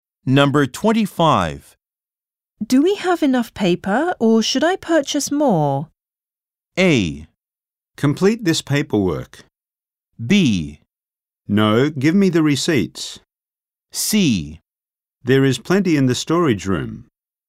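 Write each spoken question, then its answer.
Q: Do we have enough paper or should I purchase more?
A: C: There is plenty in the storage room.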